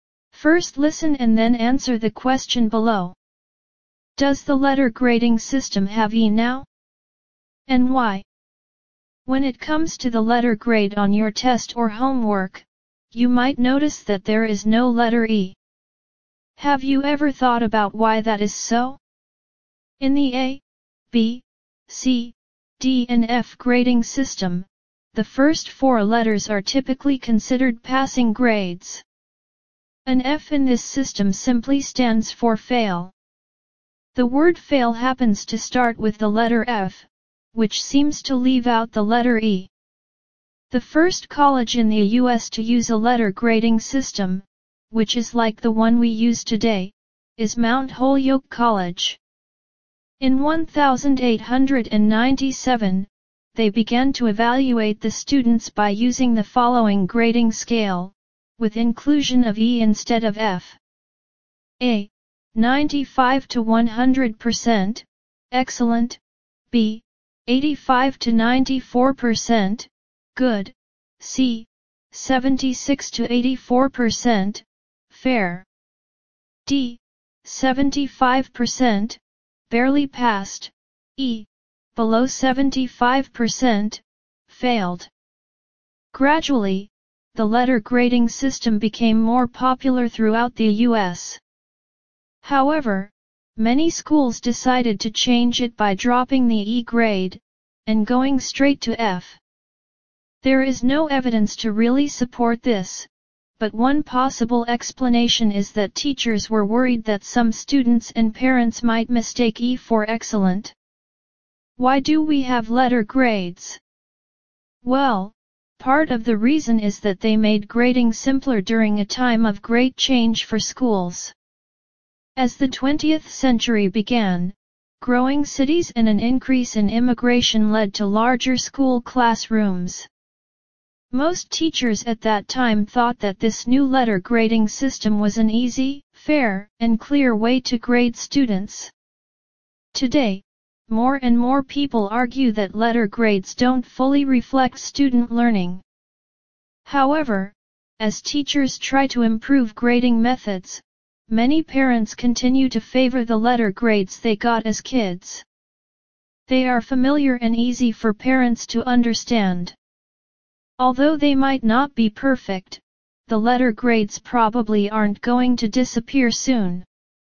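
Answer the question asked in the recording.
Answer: No, because E might be mistaken for excellent (F stands for fail)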